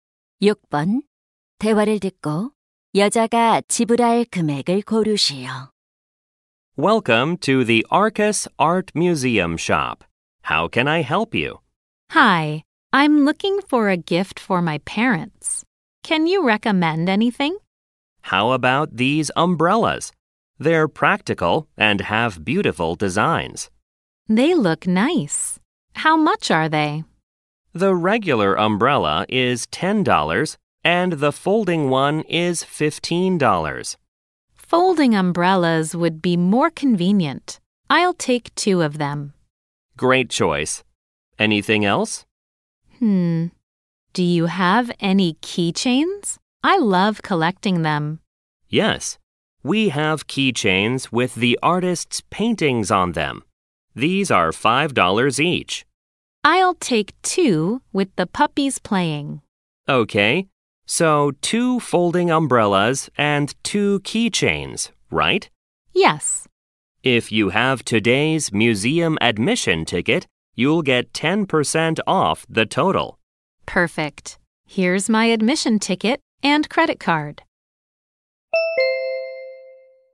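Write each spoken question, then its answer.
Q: 대화를 듣고 여자가 지불할 금액을 고르시오.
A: $36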